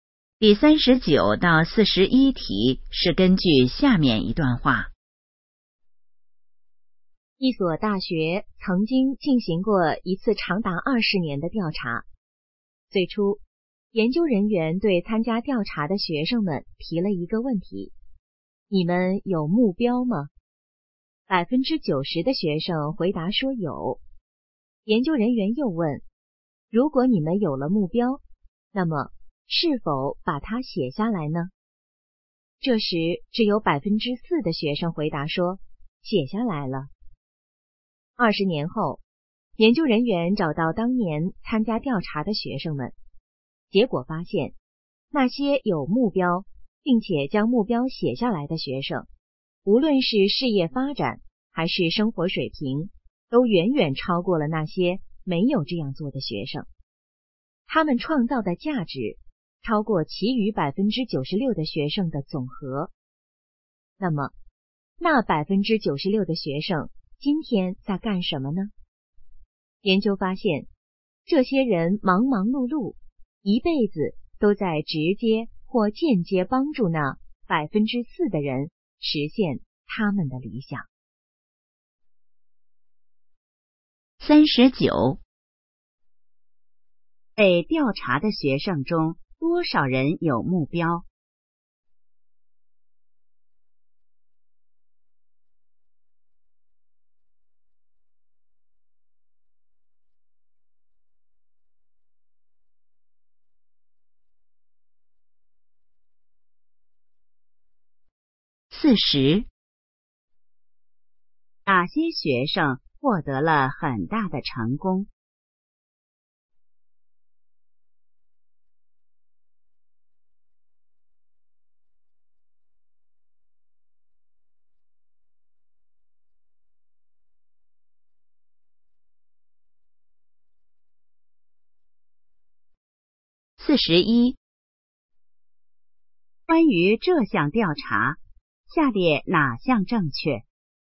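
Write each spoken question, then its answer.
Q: 被调查的学生中多少人有目标?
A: 90%

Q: 哪些学生获得了很大的成功?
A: 有目标并且把目标写下来的学生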